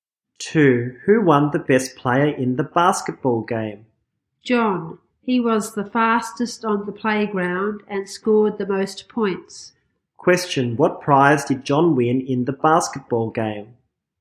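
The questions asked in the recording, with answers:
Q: Question, what prize did John win in the basketball game?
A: Best player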